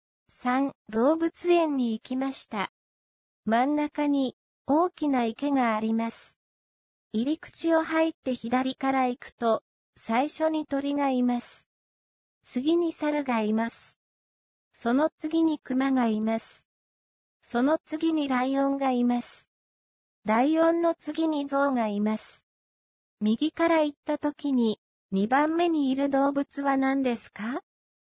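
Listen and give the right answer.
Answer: ライオン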